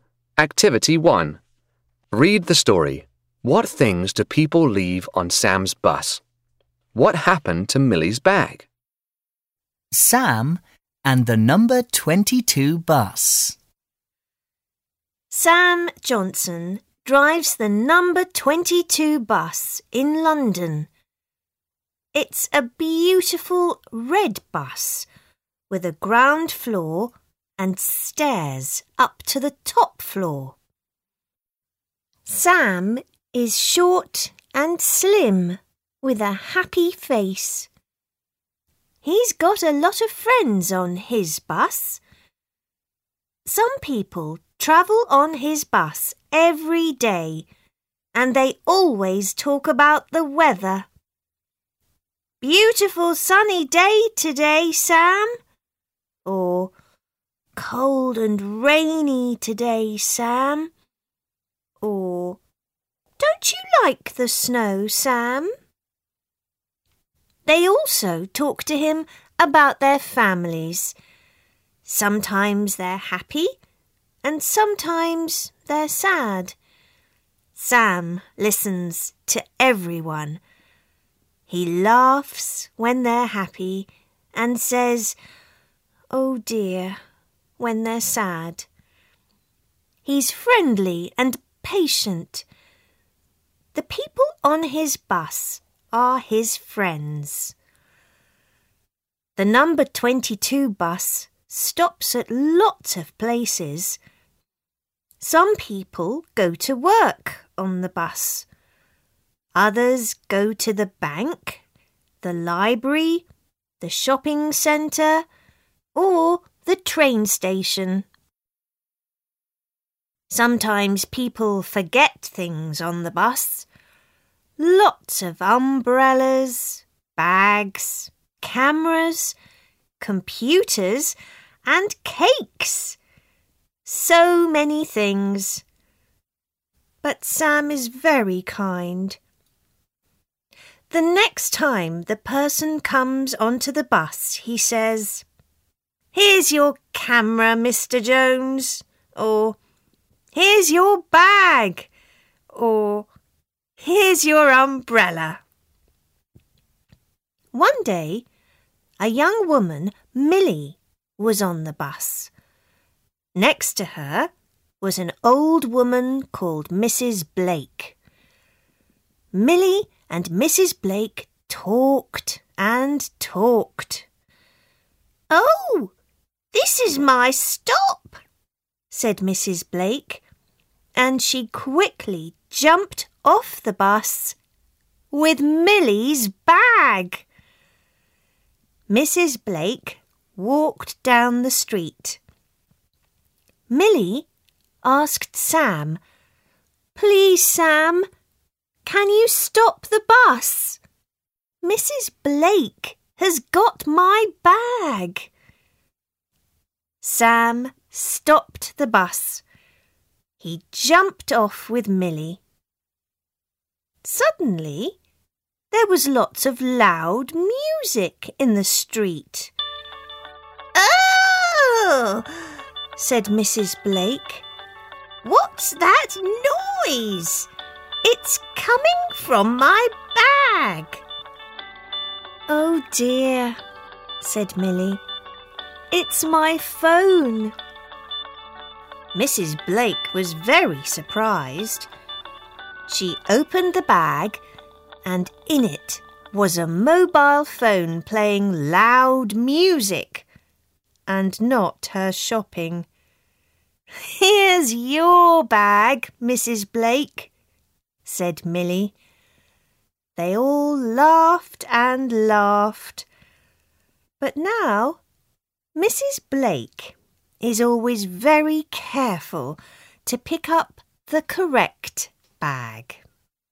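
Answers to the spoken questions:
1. Umbrellas, bags, cameras, computers and cakes
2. Mrs. Blake took it by mistake when she got off the bus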